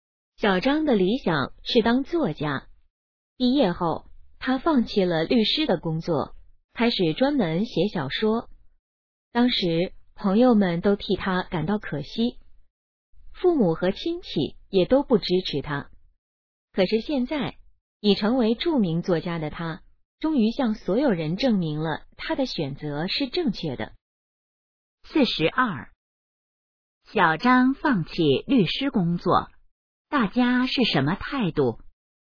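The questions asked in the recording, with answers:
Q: 小张放弃律师工作,大家是什么态度?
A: 觉得可惜,不支持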